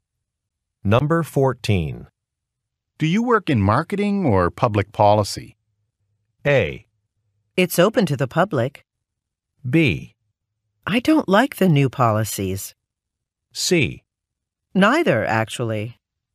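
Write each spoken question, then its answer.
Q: Do you work in marketing or public policy?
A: C: Neither, actually.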